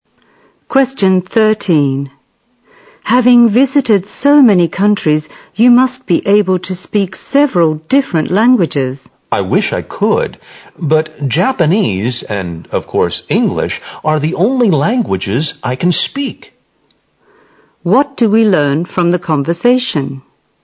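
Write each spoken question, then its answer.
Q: What do we learn from the conversation?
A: The speaker can speak only two languages: Japanese and English.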